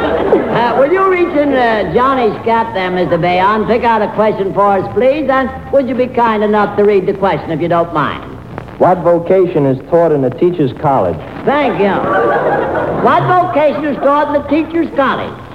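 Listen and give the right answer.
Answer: Teaching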